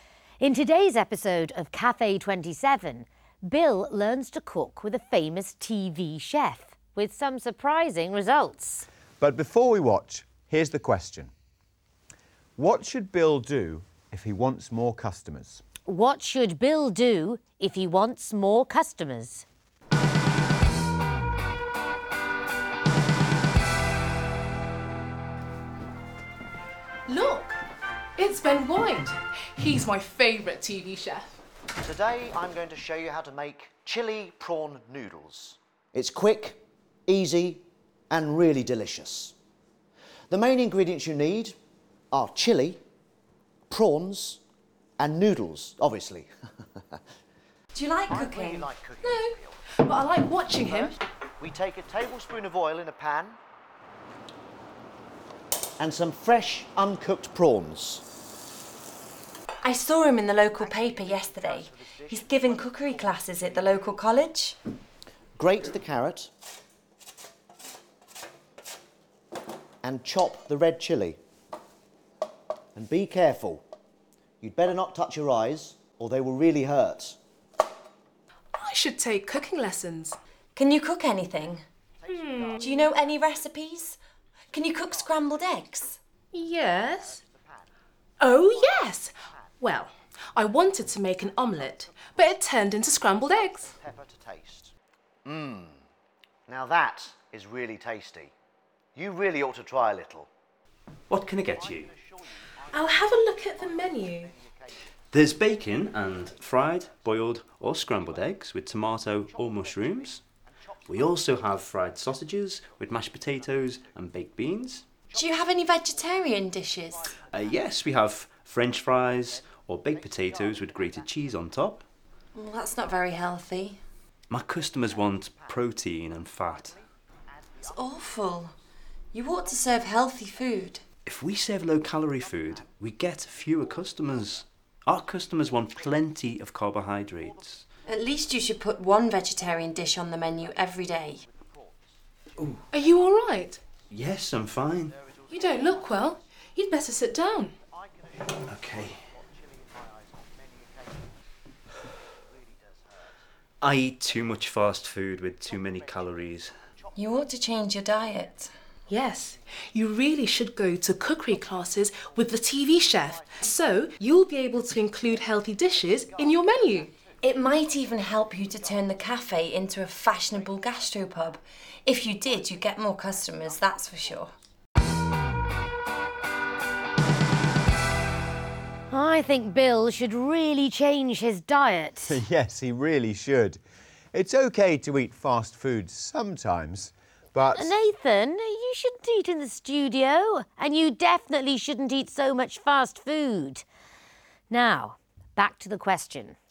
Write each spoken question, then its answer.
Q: What should Bill do if he wants more customers?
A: The girls tell Bill he should go to cookery classes with a TV chef and learn how to cook healthy dishes for the cafe.